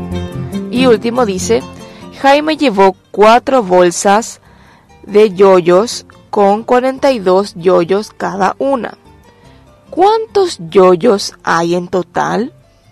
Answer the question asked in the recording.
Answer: En total hay 168 yoyos.